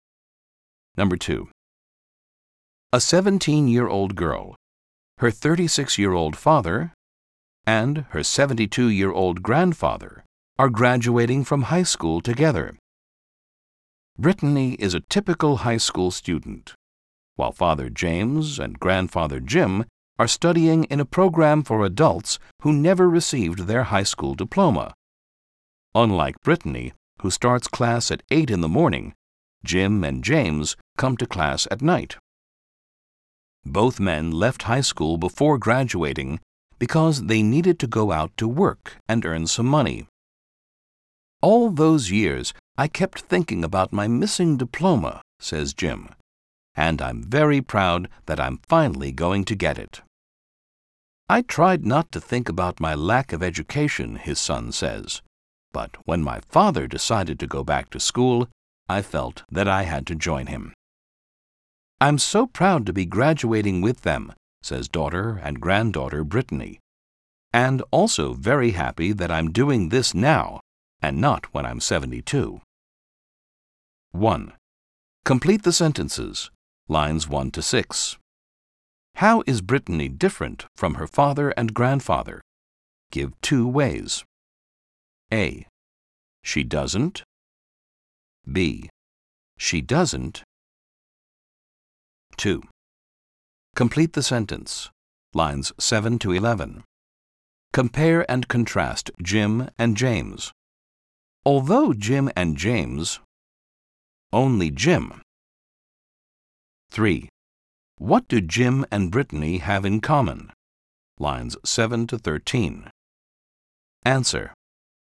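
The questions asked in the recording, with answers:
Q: How is Brittany different from her father and grandfather?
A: She doesn't study in an adult program / didn't leave school; she doesn't come to class at night

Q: Compare and contrast Jim and James.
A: Although both left school to work, only Jim kept thinking about his missing diploma

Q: What do Jim and Brittany have in common?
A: Both are proud to be graduating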